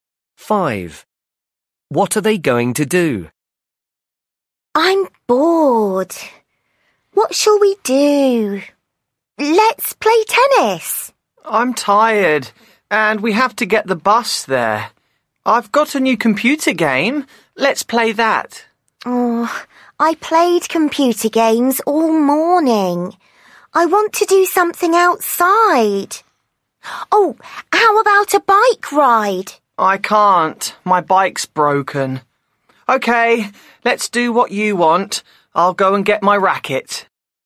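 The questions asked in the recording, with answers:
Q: What are they going to do?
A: play tennis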